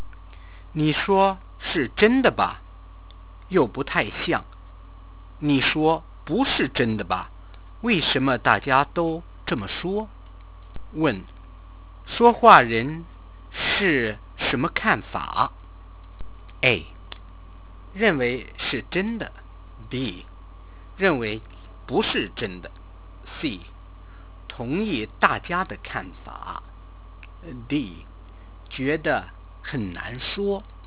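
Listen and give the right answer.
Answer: D: 觉得很难说。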